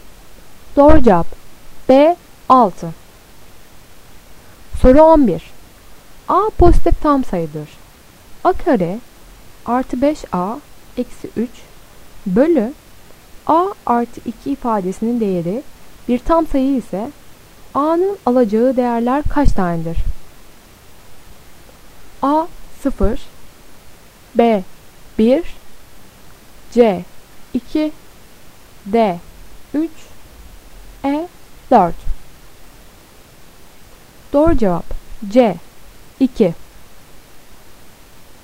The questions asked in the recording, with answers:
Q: A kare artı 5A eksi 3 bölü A artı 2 ifadesinin değeri bir tam sayı ise A'nın alacağı değerler kaç tanedir?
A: Doğru cevap C 2